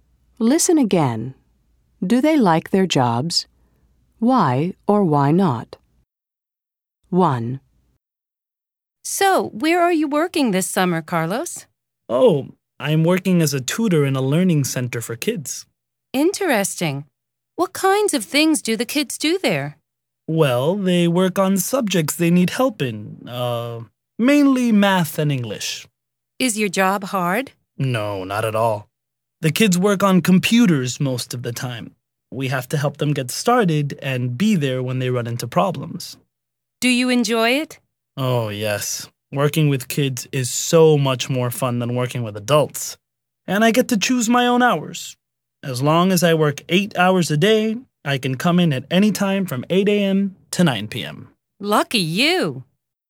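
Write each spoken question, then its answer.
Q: Do they like their jobs?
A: Yes, Carlos likes it: working with kids is fun and he chooses his own hours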